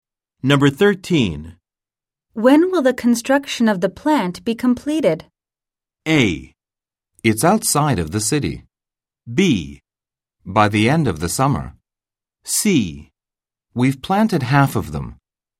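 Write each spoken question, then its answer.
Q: When will the construction of the plant be completed?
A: B: By the end of the summer.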